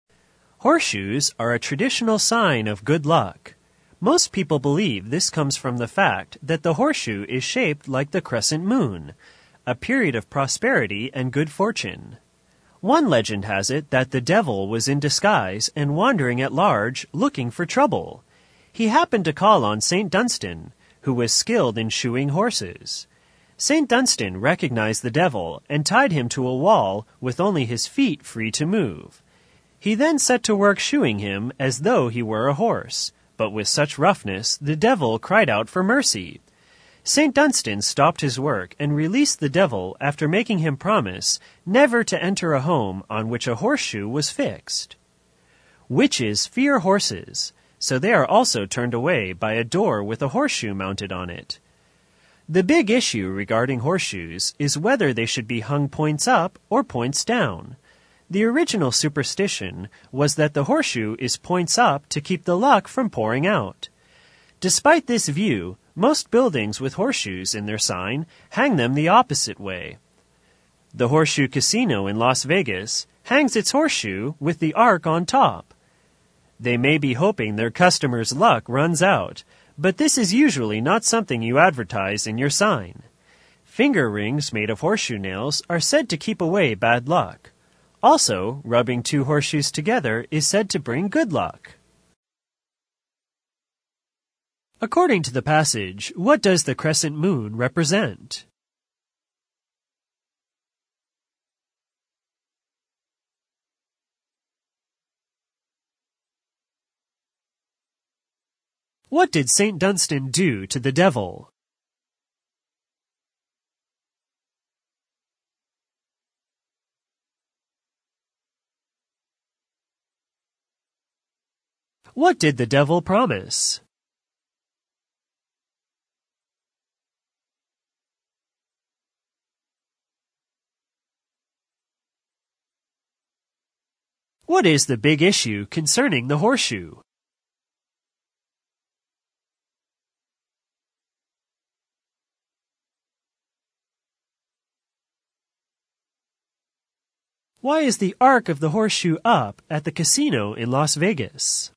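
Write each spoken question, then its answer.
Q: According to the passage, what does the crescent moon represent?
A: A period of prosperity and good fortune

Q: What did St. Dunstan do to the devil?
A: Tied him to a wall and roughly shod his feet like a horse's

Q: What did the devil promise?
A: Never to enter a home with a horseshoe fixed on it

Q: What is the big issue concerning the horseshoe?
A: Whether it should be hung points up or points down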